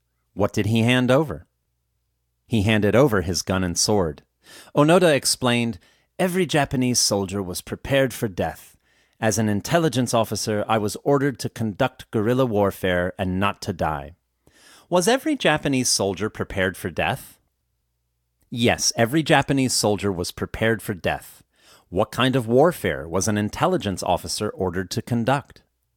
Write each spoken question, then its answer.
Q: What kind of warfare was an intelligence officer ordered to conduct?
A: An intelligence officer was ordered to conduct guerrilla warfare.